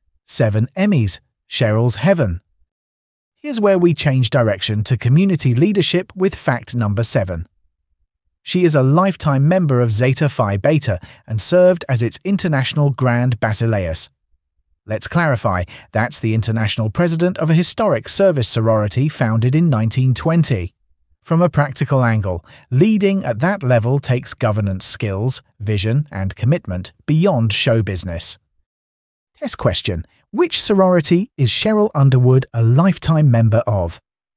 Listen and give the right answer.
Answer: Correct answer, Zeta Phi Beta.